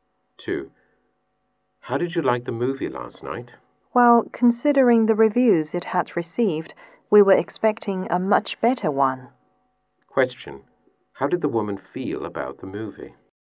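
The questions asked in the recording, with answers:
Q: How did the woman feel about the movie?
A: Disappointed; it was worse than expected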